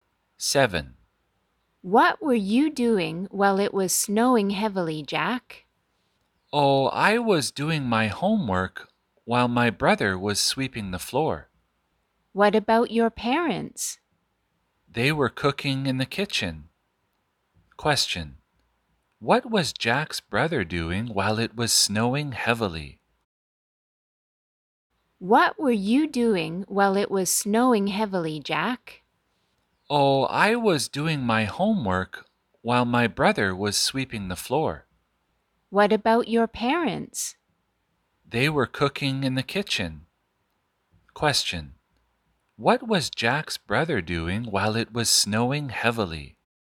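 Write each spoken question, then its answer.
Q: What was Jack's brother doing while it was snowing heavily?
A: Sweeping the floor.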